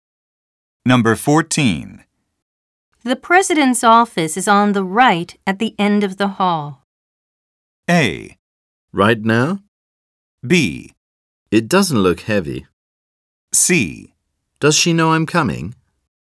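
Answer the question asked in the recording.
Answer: C: Does she know I'm coming?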